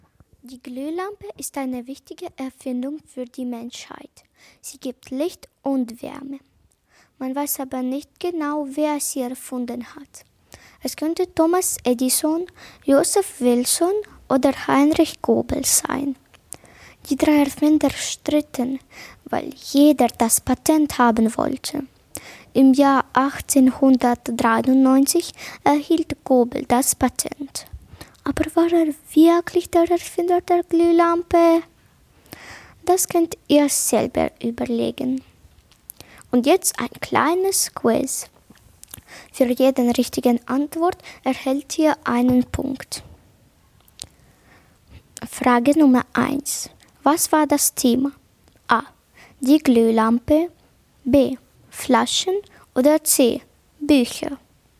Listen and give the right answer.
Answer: Und das richtige Antwort war A.